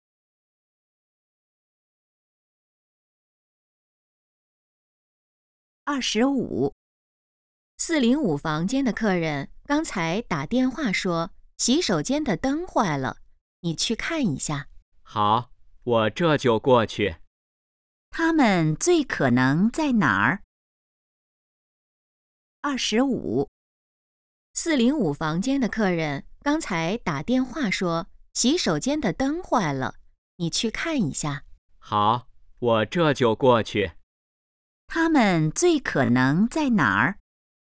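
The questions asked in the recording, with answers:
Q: 他们最可能在哪儿?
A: 宾馆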